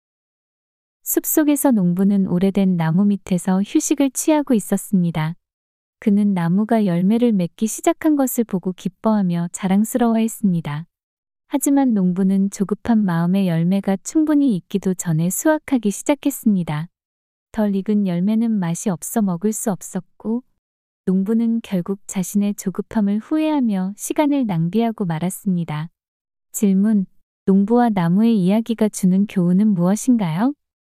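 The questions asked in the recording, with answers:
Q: 농부와 나무의 이야기가 주는 교훈은 무엇인가요?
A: 조급해하지 말고 때가 될 때까지 인내심을 가지고 기다려야 한다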